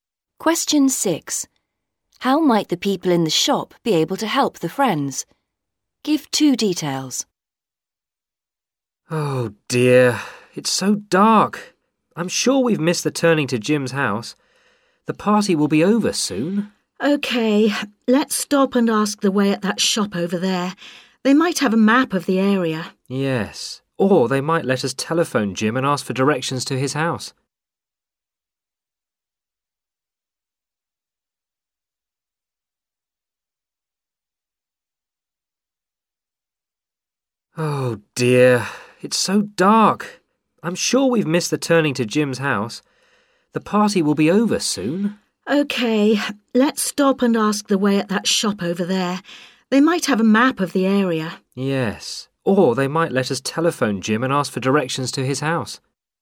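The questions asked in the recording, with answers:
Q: How might the people in the shop be able to help the friends?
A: They might have a map of the area; they might let them telephone Jim for directions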